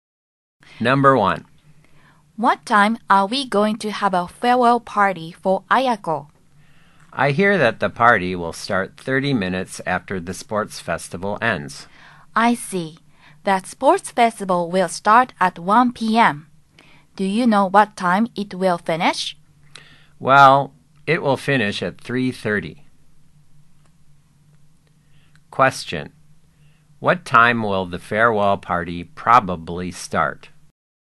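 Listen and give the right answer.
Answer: At 4:00 p.m.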